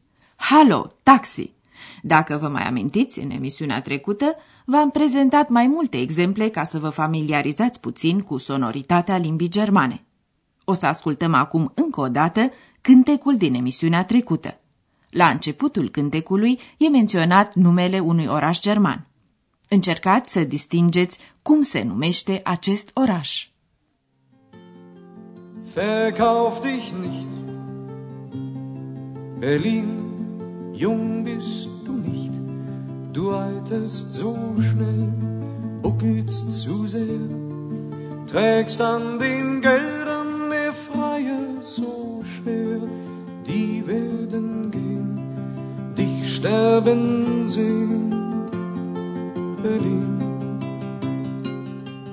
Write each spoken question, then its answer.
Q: Încercați să distingeți cum se numește acest oraș.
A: Berlin. Berlin.